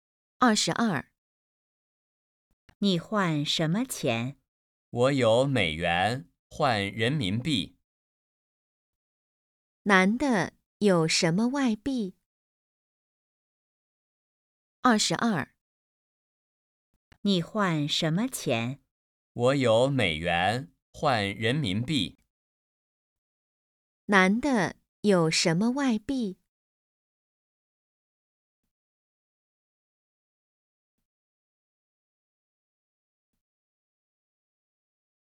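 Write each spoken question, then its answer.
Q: 男的有什么外币?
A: 美元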